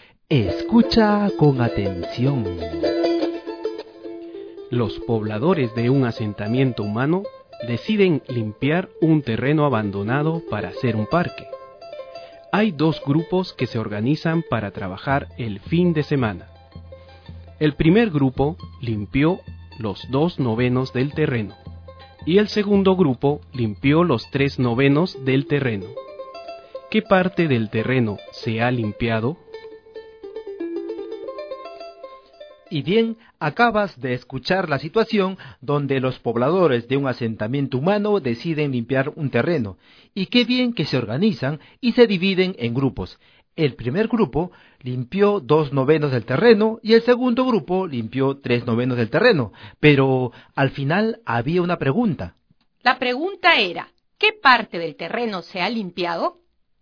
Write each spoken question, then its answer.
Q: ¿Qué parte del terreno se ha limpiado?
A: Se ha limpiado 5 novenos del total del terreno.